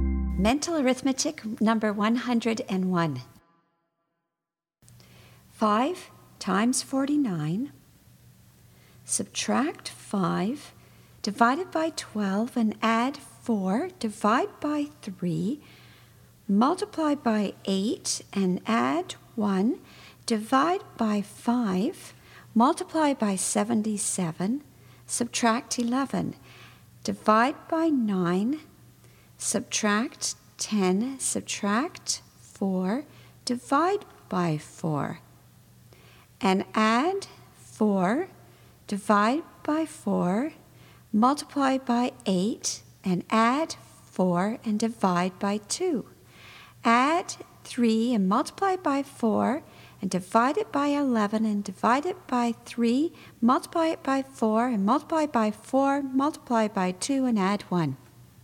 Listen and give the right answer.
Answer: And the answer is 129.